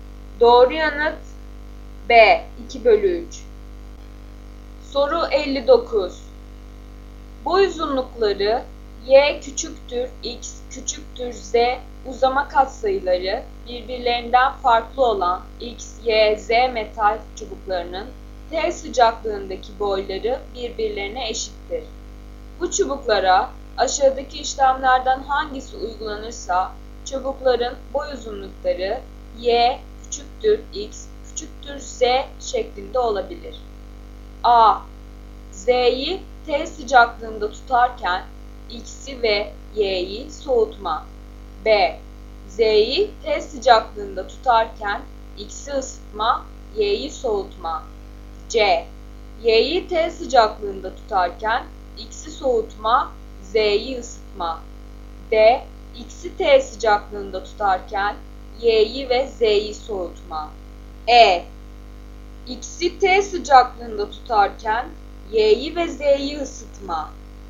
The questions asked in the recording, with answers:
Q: Bu çubuklara aşağıdaki işlemlerden hangisi uygulanırsa çubukların boy uzunlukları y küçüktür, x küçüktür, z şeklinde olabilir.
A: Doğru yanıt A.